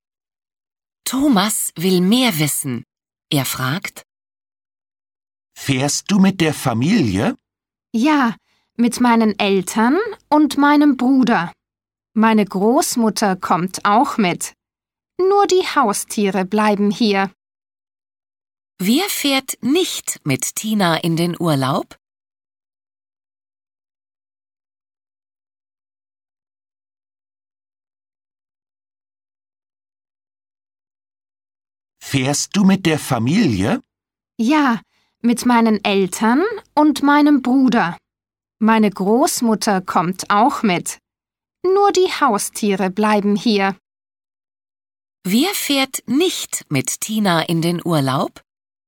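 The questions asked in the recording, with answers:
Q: Wer fährt nicht mit Tina in den Urlaub?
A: Die Haustiere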